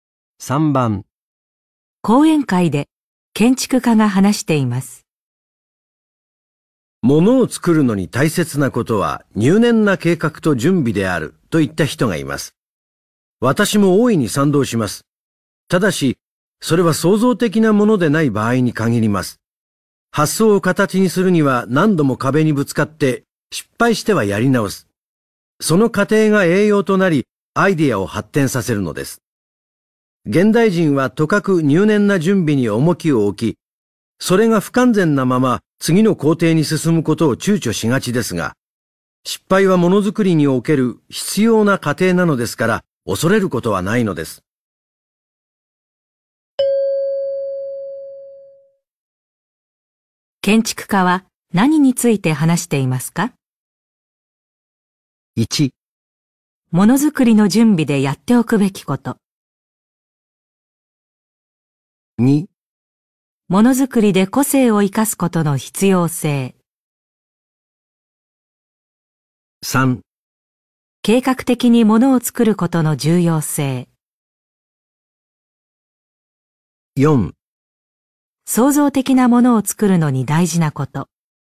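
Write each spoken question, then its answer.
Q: 建築家は何について話していますか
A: 4: 創造的なものを作るのに大事なこと。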